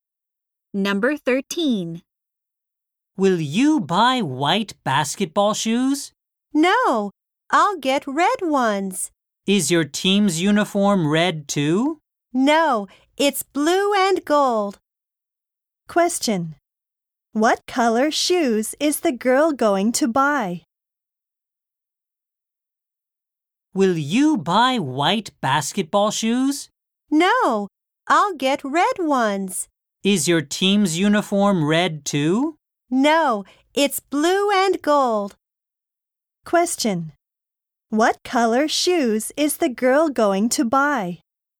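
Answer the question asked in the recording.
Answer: Red.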